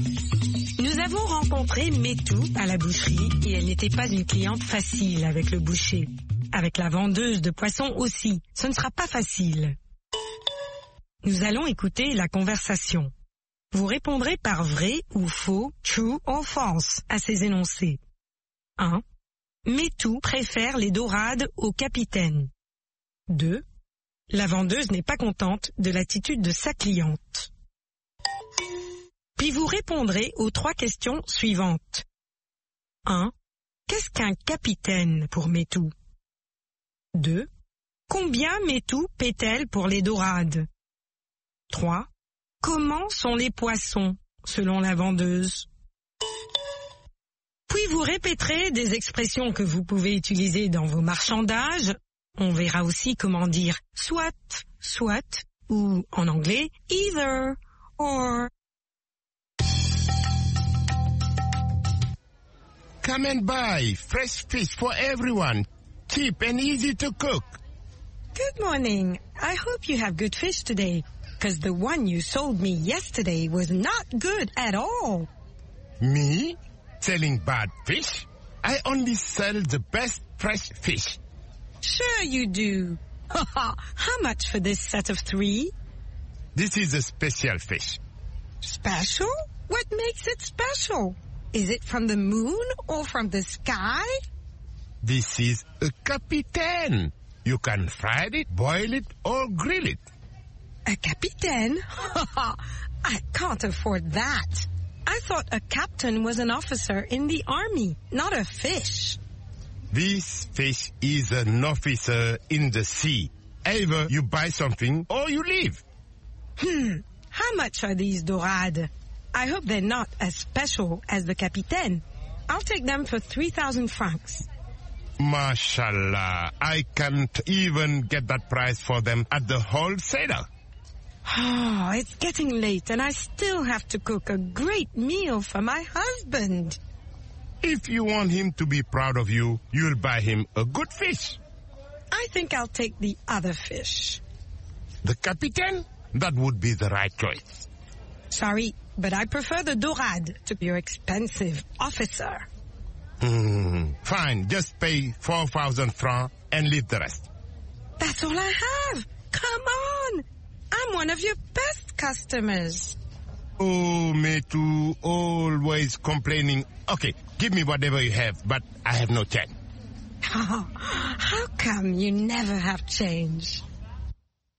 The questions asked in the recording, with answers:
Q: Metou préfère les dorades au capitaine.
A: L'énoncé 1 est vrai. Metou préfère les dorades au capitaine.

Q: La vendeuse n'est pas contente de l'attitude de sa cliente.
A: L'énoncé 2 est vrai. La vendeuse n'est pas contente de l'attitude de sa cliente.

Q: Qu'est-ce qu'un capitaine pour Metou?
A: Pour elle, un capitaine est un officier de l'armée.

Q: Combien Metou paie-t-elle pour les dorades?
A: 3000 francs.

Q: Comment sont les poissons, selon la vendeuse?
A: Ils sont frais.